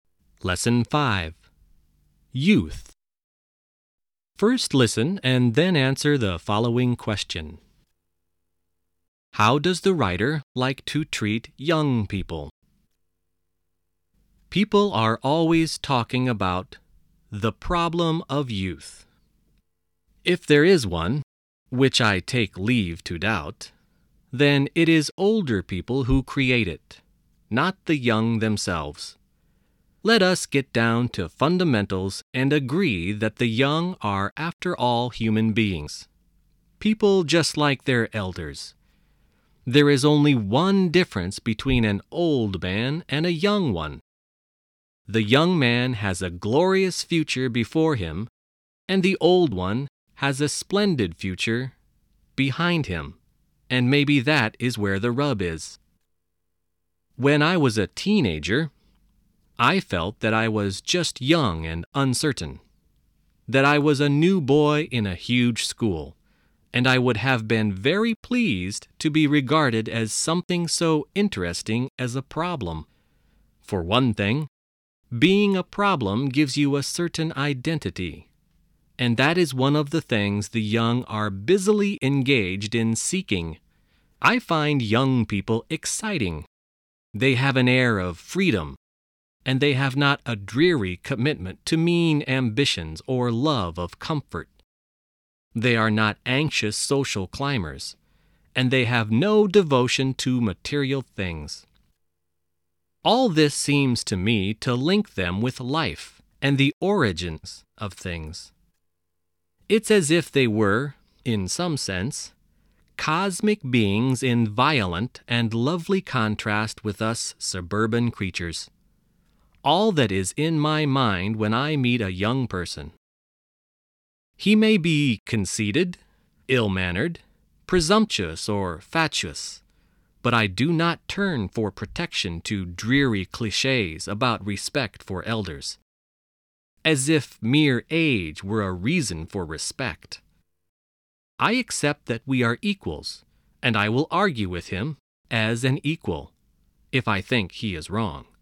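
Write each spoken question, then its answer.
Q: How does the writer like to treat young people?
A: As equals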